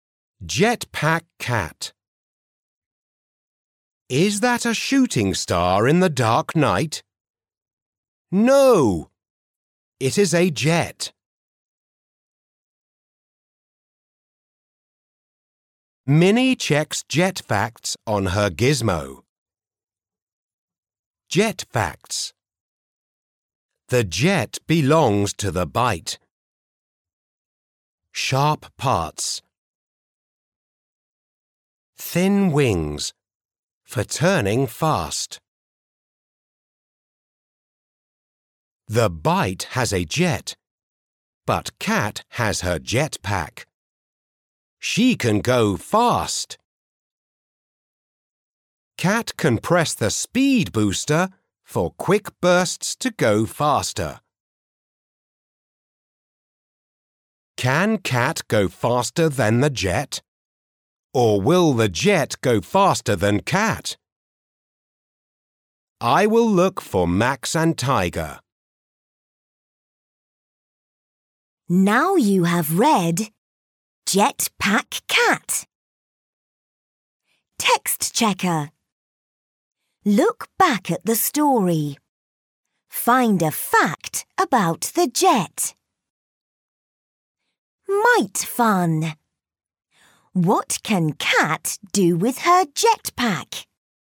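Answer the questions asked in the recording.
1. The jet belongs to the Bite; it has sharp parts and thin wings for turning fast.
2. She can go fast, pressing the speed booster for quick bursts.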